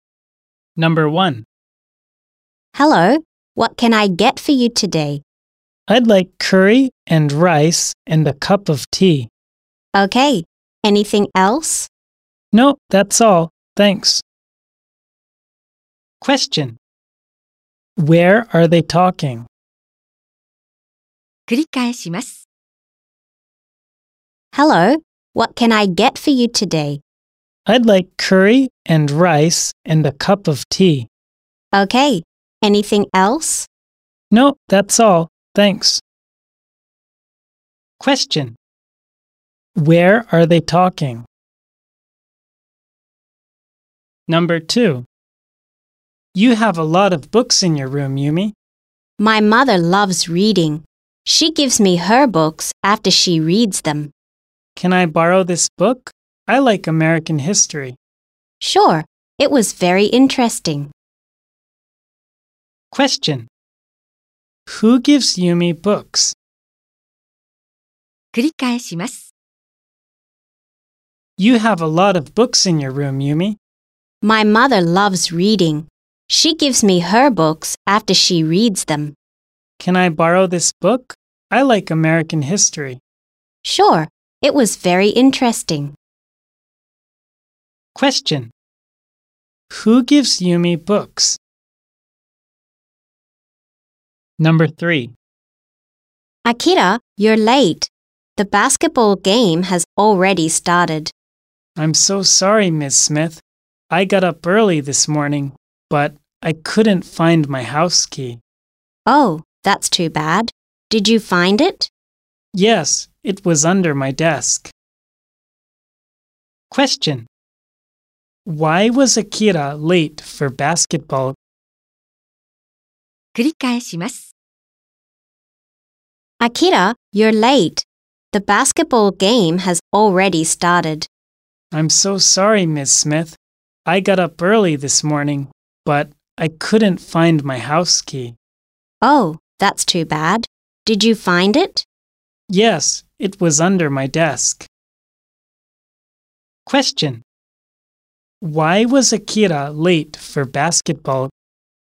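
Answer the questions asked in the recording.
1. At a restaurant.
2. Her mother.
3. Because he couldn't find his house key.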